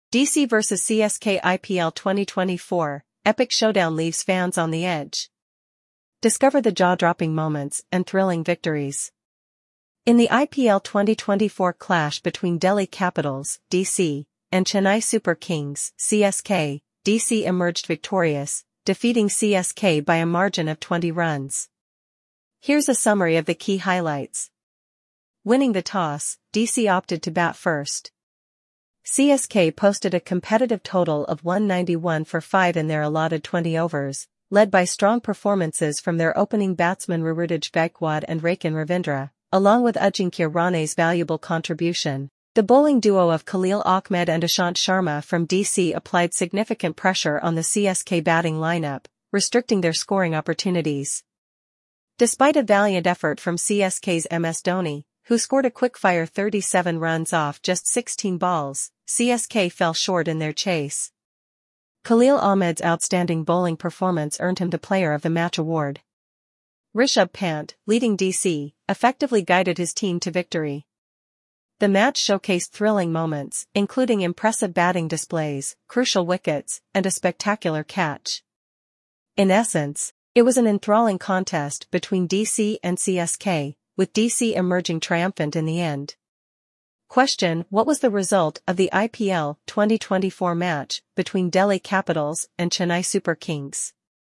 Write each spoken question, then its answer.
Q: what was the result of the IPL 2024 match between Delhi Capitals and Chennai Super Kings?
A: Delhi Capitals emerged victorious, defeating Chennai Super Kings by a margin of 20 runs.